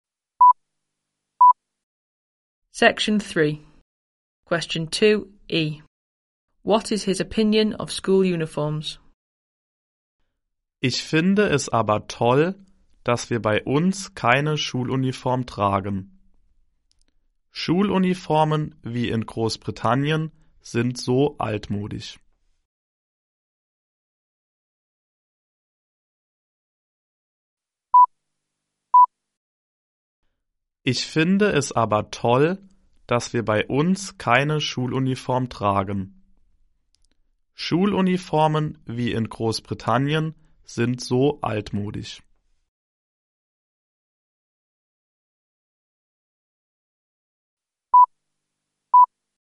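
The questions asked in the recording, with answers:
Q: What is his opinion of school uniforms?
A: They are old-fashioned; he is glad they don't wear one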